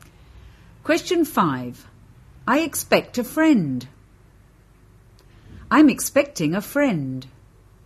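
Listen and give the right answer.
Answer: B: I'm expecting a friend.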